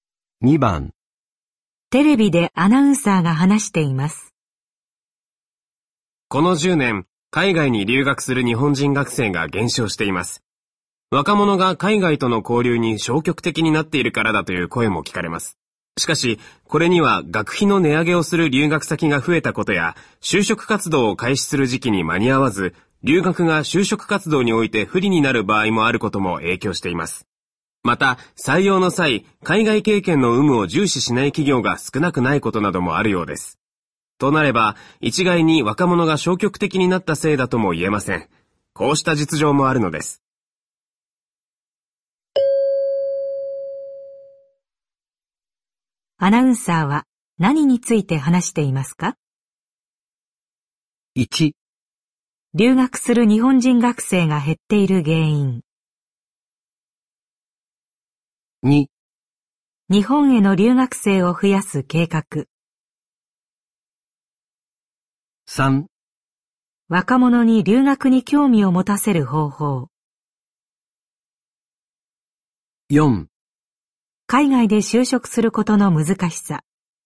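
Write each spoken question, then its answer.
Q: アナウンサーは何について話していますか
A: 1: 留学する日本人学生が減っている原因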